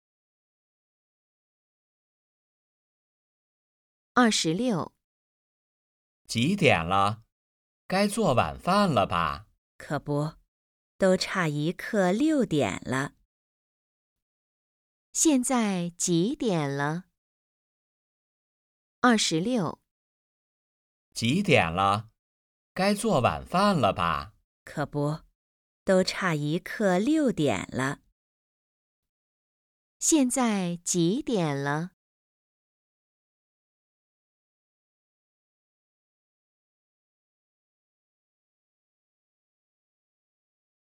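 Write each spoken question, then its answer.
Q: 现在几点了?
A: 五点四十五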